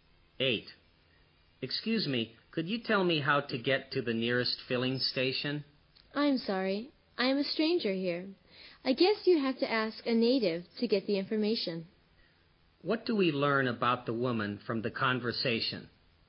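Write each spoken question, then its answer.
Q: What do we learn about the woman from the conversation?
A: She is a stranger there and doesn't know the way.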